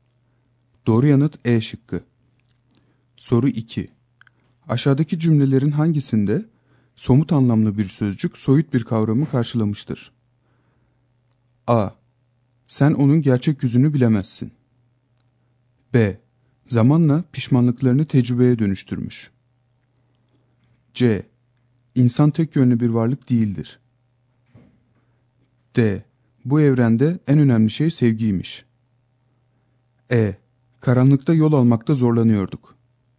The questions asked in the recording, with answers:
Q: Aşağıdaki cümlelerin hangisinde somut anlamlı bir sözcük soyut bir kavramı karşılamıştır?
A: Doğru yanıt A şıkkı.